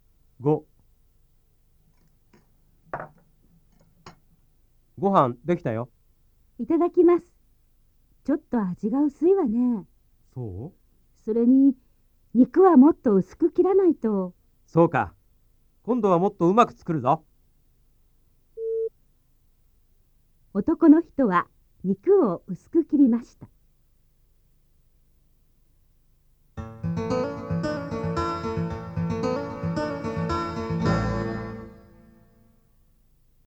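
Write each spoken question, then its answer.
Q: 男の人は肉を薄く切りました。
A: ×(間違い)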